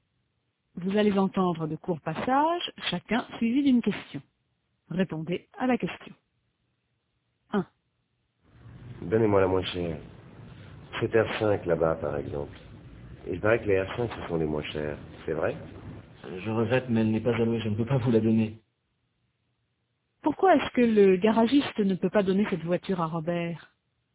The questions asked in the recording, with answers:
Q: Pourquoi est-ce que le garagiste ne peut pas donner cette voiture à Robert?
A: Parce qu'elle n'est pas allouée.